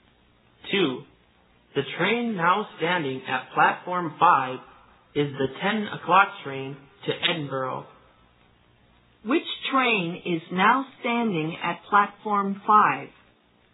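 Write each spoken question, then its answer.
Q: Which train is now standing at Platform 5?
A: The 10 o'clock train to Edinburgh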